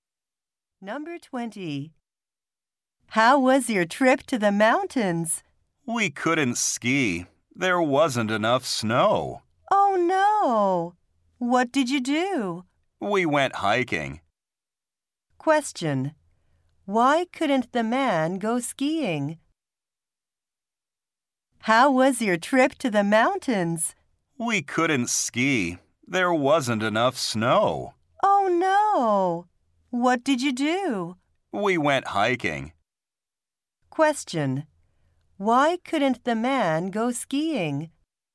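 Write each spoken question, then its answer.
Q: Why couldn't the man go skiing?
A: There wasn't enough snow.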